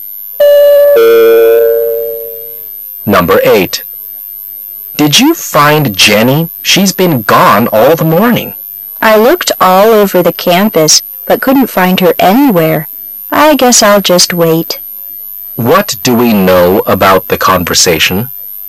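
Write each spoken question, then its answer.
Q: What do we know about the conversation?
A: Jenny has been missing all morning and couldn't be found

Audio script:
[解析] M: Did you find Jenny? She's been gone all the morning. W: I looked all over the campus, but couldn't find her anywhere. I guess I'll just wait. Q: What do we know about the conversation?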